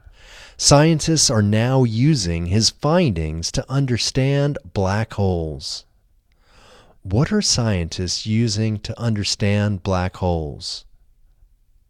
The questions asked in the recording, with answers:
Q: What are scientists using to understand black holes?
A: Scientists are using his findings to understand black holes.